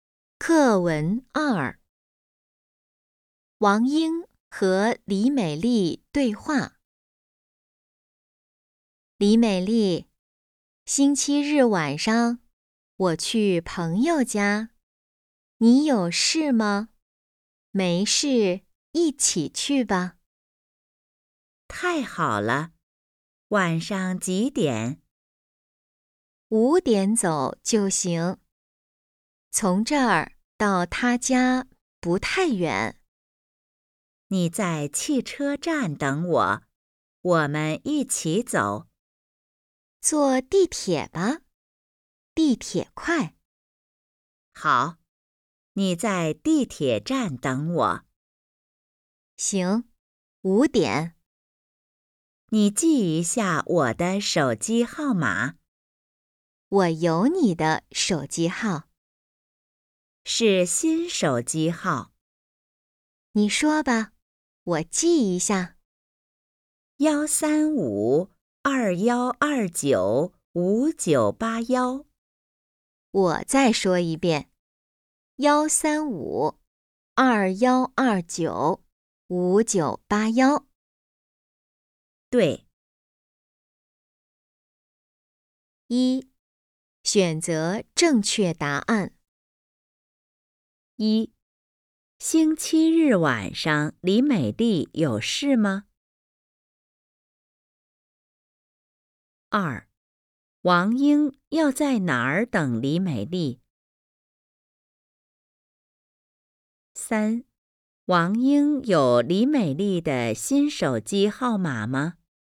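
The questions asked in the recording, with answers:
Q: 星期日晚上李美丽有事吗?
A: 没有事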